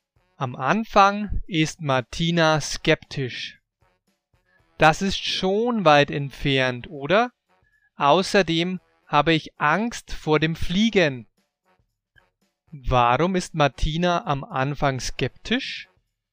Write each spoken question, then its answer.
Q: Warum ist Martina am Anfang skeptisch?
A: Weil Europa schon weit entfernt ist.